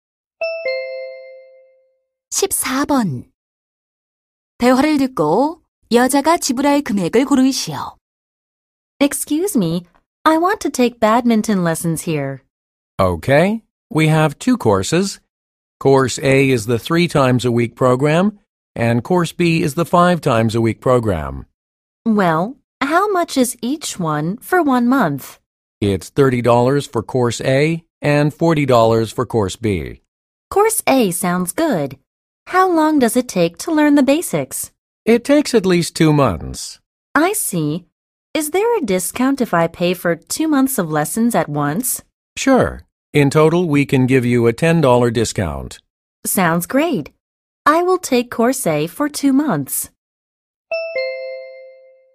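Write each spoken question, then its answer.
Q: 대화를 듣고 여자가 지불할 금액을 고르시오.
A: $50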